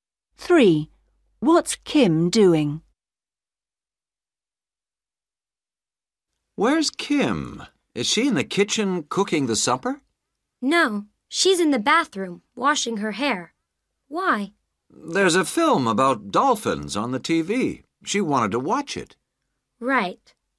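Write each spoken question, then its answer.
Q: What's Kim doing?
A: washing her hair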